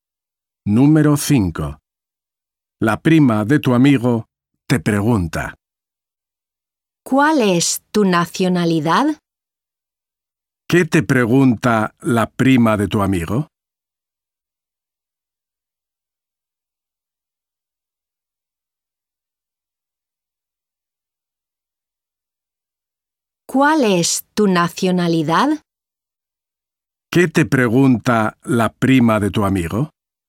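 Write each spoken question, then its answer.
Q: ¿Qué te pregunta la prima de tu amigo?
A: tu nacionalidad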